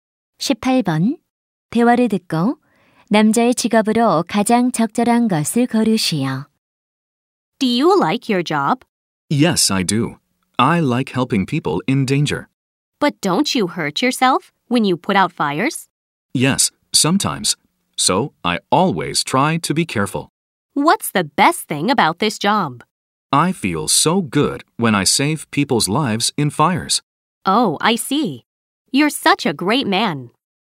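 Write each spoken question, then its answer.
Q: 대화를 듣고 남자의 직업으로 가장 적절한 것을 고르시오.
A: 소방관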